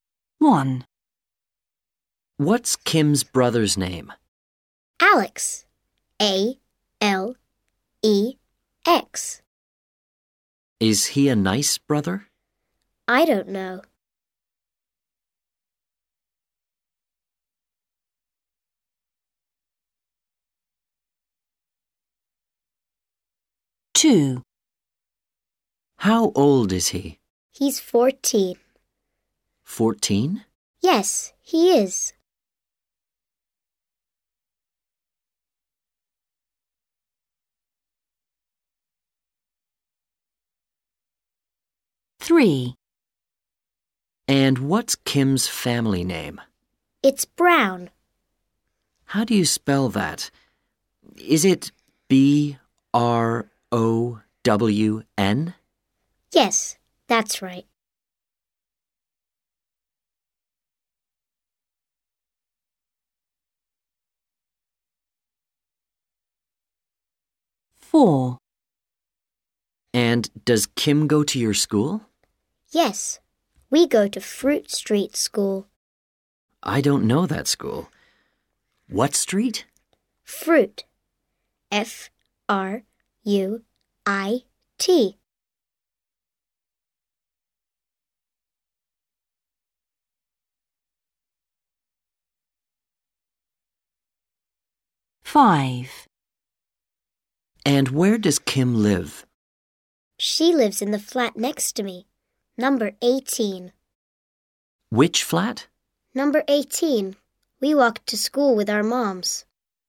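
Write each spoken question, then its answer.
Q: What's Kim's brother's name?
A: Alex

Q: How old is he?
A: 14

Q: And what's Kim's family name?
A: Brown

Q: What street?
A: Fruit

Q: Which flat?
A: 18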